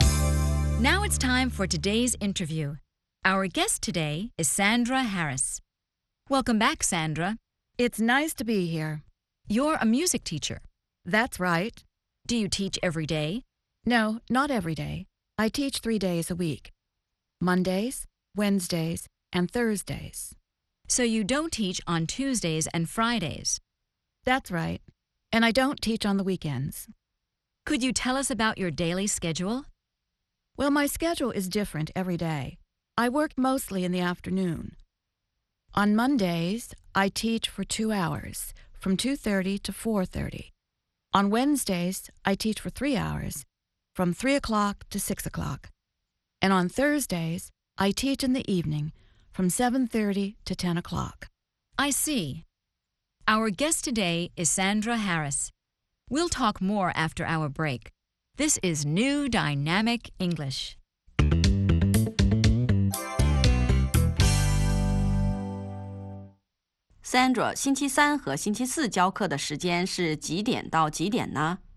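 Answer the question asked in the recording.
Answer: 星期三从三点到六点,星期四从七点半到十点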